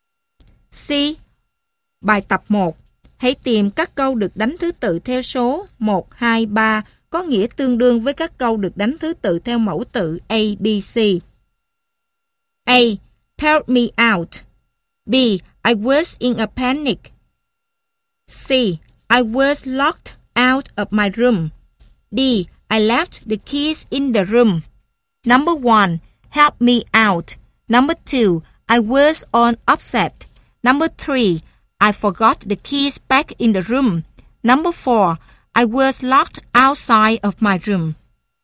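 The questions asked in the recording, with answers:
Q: Help me out.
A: A: Help me out

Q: I was on upset.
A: B: I was in a panic

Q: I forgot the keys back in the room.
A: D: I left the keys in the room

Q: I was locked outside of my room.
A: C: I was locked out of my room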